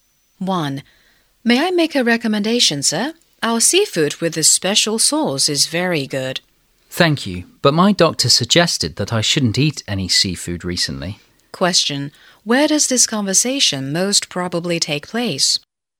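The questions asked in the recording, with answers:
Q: Where does this conversation most probably take place?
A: In a restaurant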